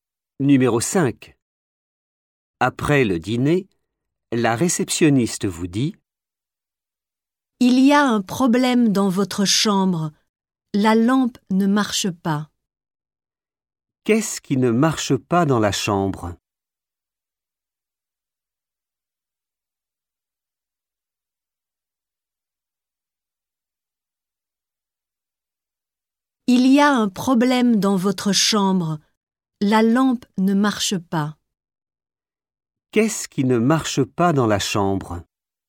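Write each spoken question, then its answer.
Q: Qu'est-ce qui ne marche pas dans la chambre?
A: la lampe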